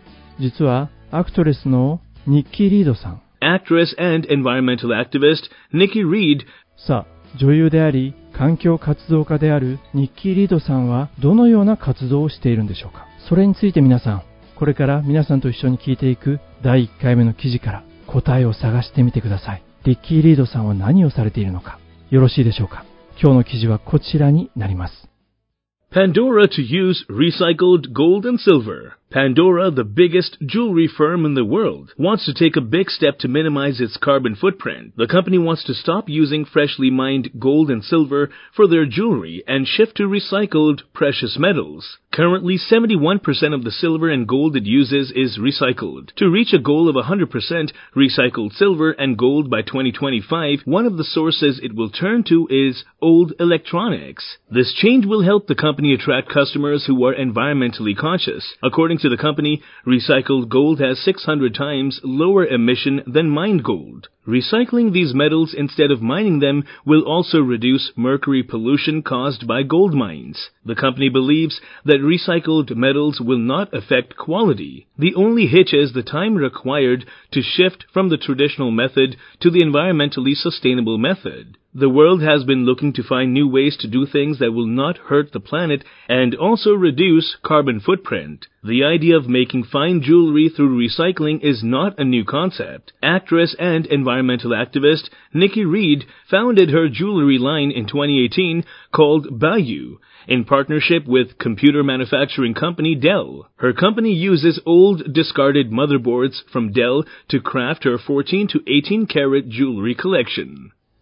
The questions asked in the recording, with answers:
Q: さあ、女優であり、環境活動家であるニッキー・リードさんは、どのような活動をしているんでしょうか。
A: 彼女の会社は何かを使っているんですね。